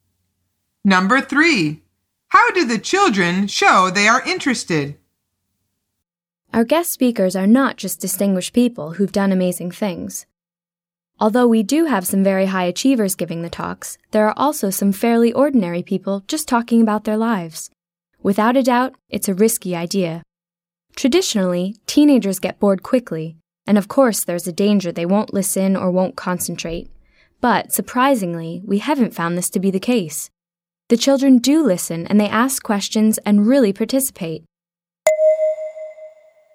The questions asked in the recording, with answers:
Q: How do the children show they are interested?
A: The answer is they listen and ask questions.